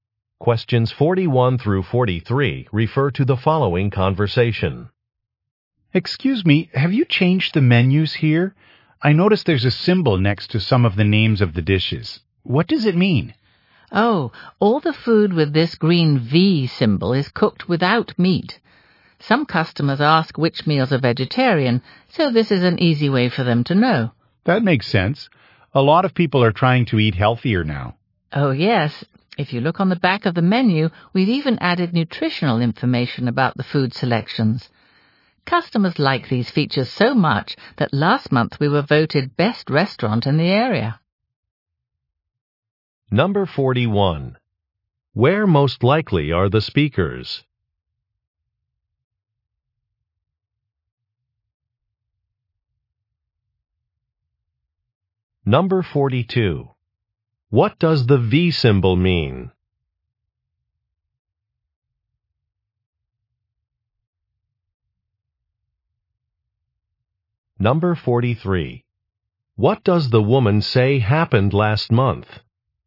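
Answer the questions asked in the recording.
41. At a restaurant
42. The dish is vegetarian (cooked without meat)
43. The restaurant was voted best in the area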